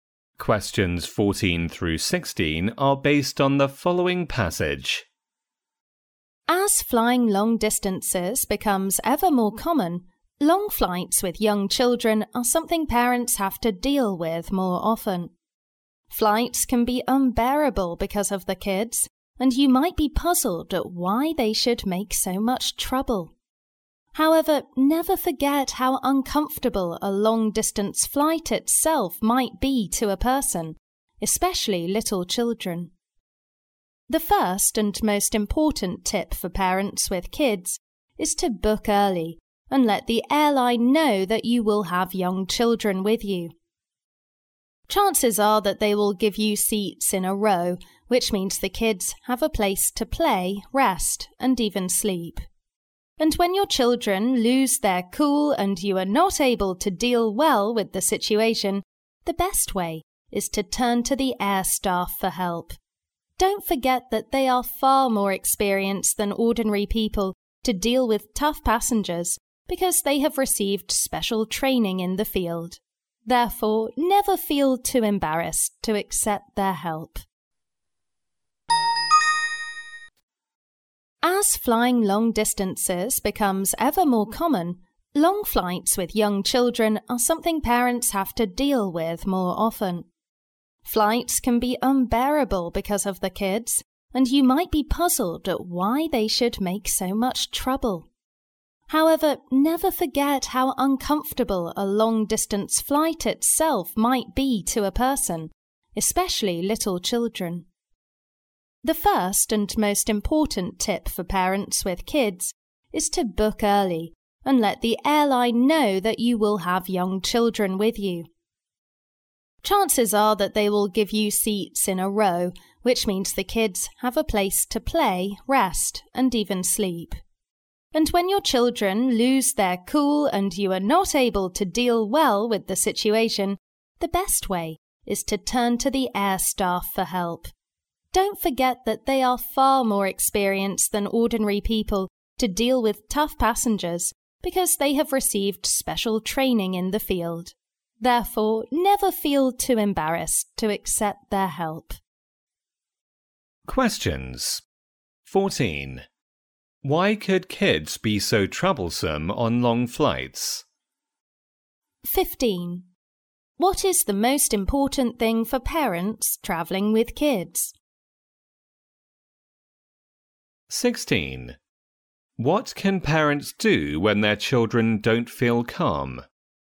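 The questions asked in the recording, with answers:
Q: Why could kids be so troublesome on long flights?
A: Long flights are very uncomfortable for them

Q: What is the most important thing for parents travelling with kids?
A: Book early and tell the airline they have young children

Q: What can parents do when their children don't feel calm?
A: Ask the air staff for help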